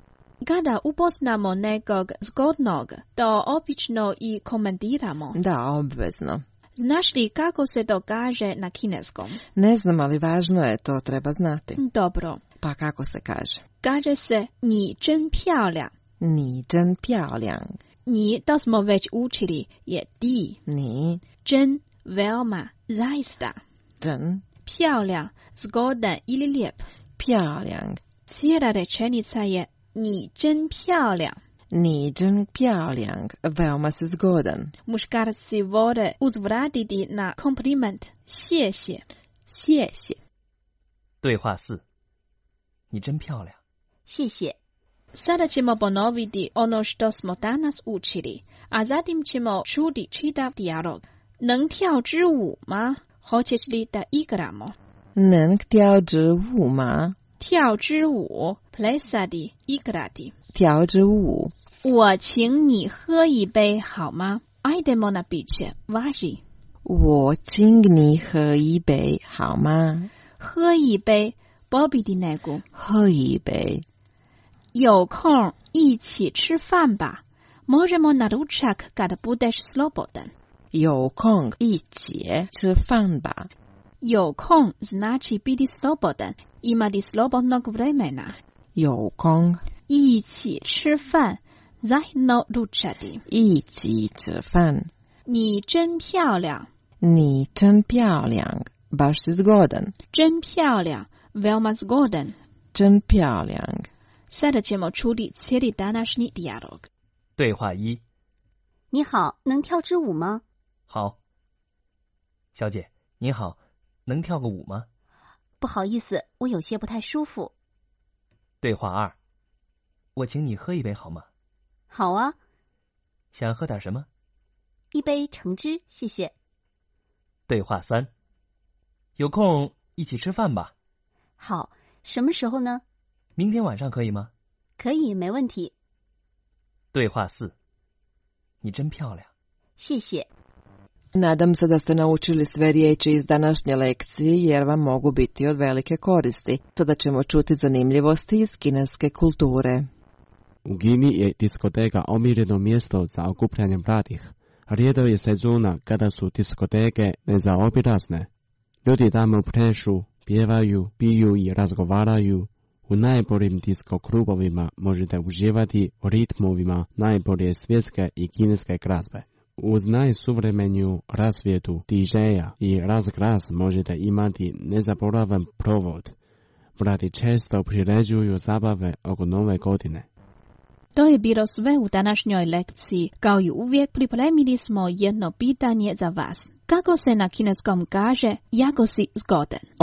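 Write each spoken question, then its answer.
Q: Kako se na kineskom kaže jako si zgodan?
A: 你真漂亮 (Ni zhen piao liang)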